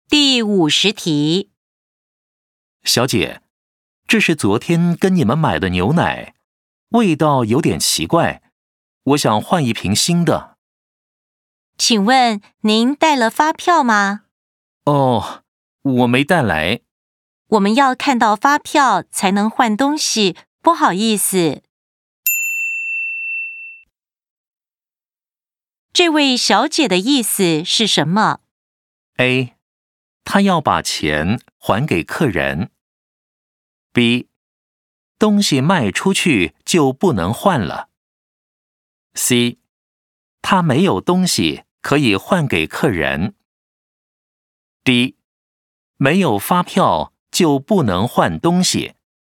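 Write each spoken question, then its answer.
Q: 这位小姐的意思是什么?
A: D: 没有发票就不能换东西。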